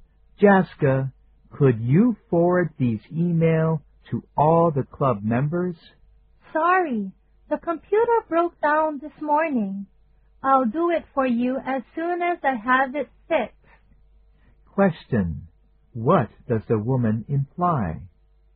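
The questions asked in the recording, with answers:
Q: What does the woman imply?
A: She can't forward the emails now because her computer is broken; she'll do it after it's fixed.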